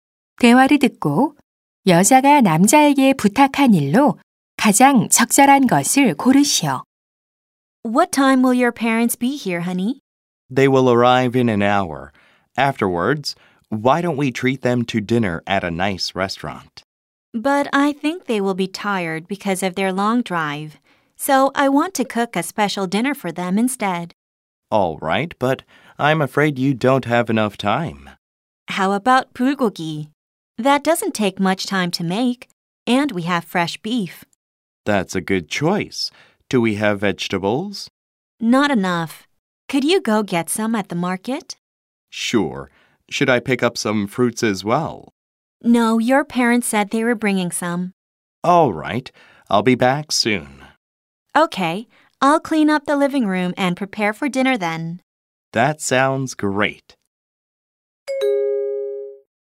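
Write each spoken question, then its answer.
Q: 대화를 듣고 여자가 남자에게 부탁한 일로 가장 적절한 것을 고르시오.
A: 시장에 가서 채소 사 오기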